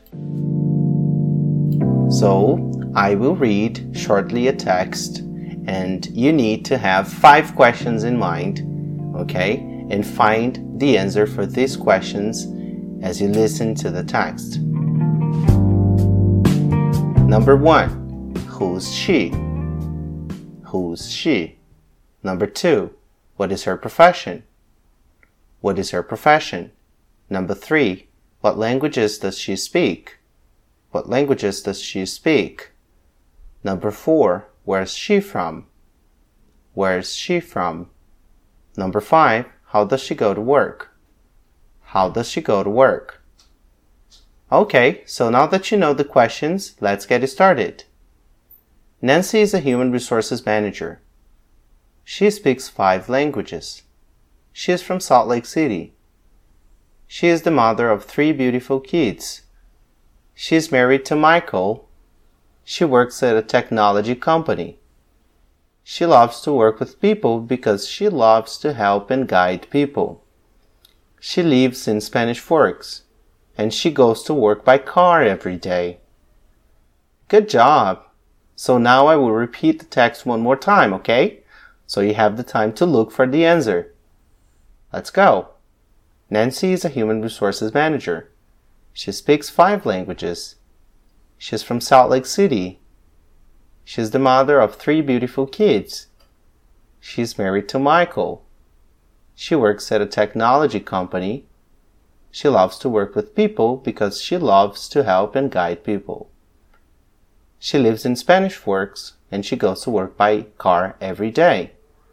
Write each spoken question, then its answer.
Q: who's she?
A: She's Nancy.

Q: what is her profession?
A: She's a human resources manager.

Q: where's she from?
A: She's from Salt Lake City.

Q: how does she go to work?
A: She goes to work by car every day.